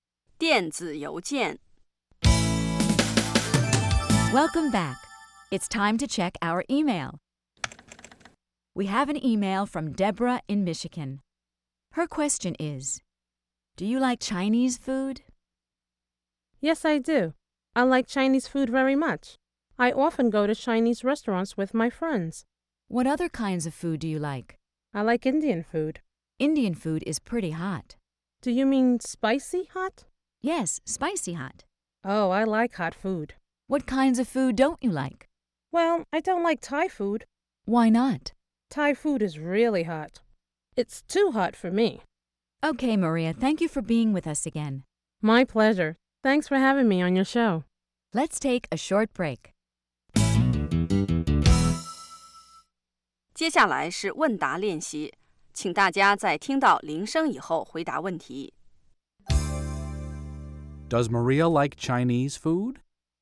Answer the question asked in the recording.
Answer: Yes, she does. She likes Chinese food.